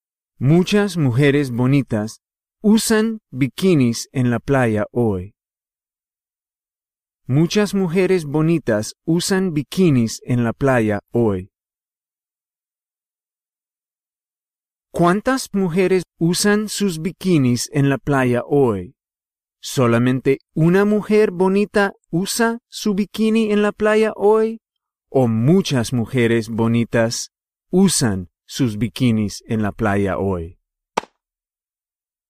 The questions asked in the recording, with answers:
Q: ¿Cuántas mujeres usan sus bikinis en la playa hoy?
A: Muchas mujeres bonitas usan un bikini en la playa hoy.